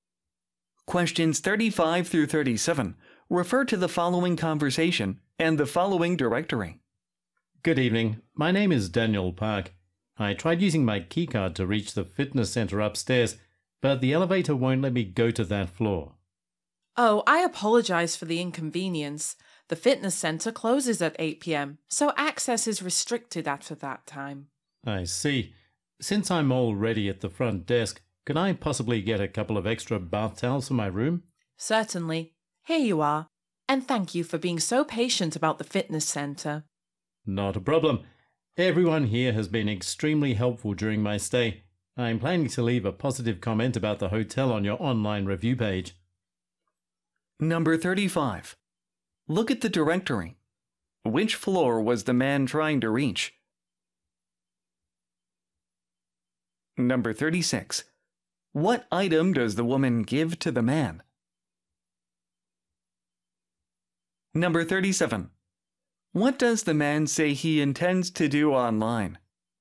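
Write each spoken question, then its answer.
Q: What item does the woman give to the man?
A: Extra bath towels

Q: What does the man say he intends to do online?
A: Leave a positive review of the hotel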